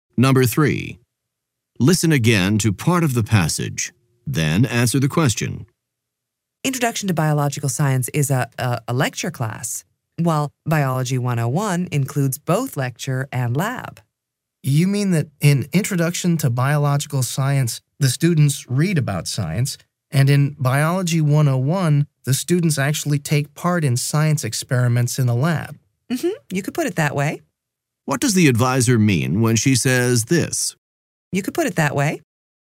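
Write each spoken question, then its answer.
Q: What does the advisor mean when she says this?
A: She agrees that the student's description of the difference between the two classes is basically correct.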